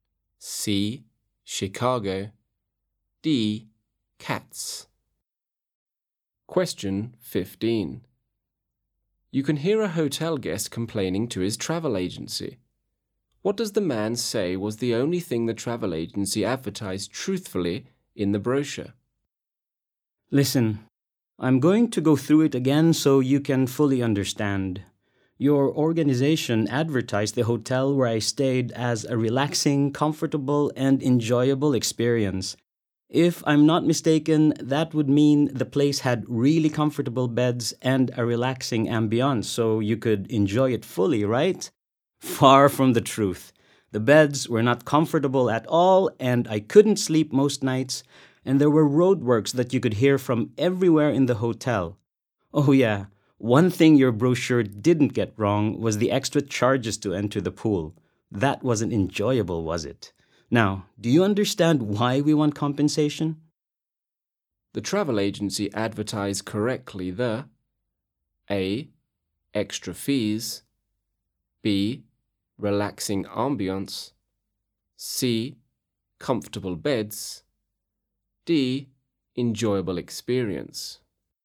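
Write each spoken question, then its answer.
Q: What does the man say was the only thing the travel agency advertised truthfully in the brochure?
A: A: Extra fees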